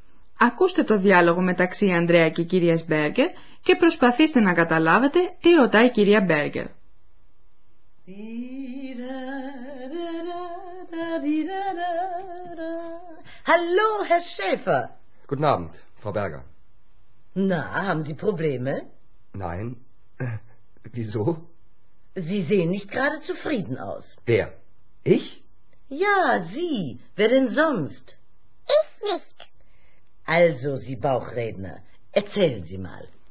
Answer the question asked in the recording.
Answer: Η κυρία Μπέργκε ρώτα τον Ανδρέα μήπως έχει προβλήματα.